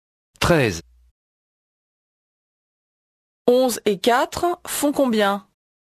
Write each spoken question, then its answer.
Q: 11 et 4 font combien?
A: 15.